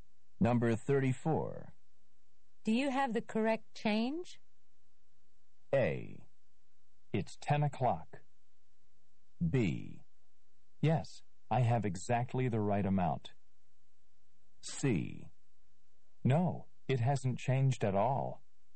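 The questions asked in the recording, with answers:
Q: Do you have the correct change?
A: B: Yes, I have exactly the right amount.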